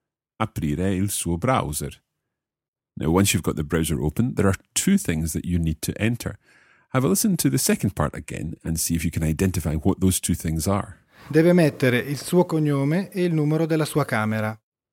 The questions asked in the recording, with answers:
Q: Have a listen to the second part again and see if you can identify what those two things are.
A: So you've got to put in your surname, il suo cognome, e il numero della sua camera, and your room number.